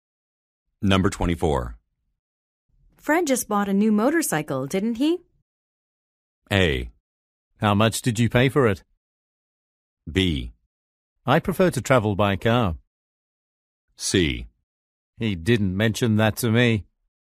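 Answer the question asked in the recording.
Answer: C: He didn't mention that to me.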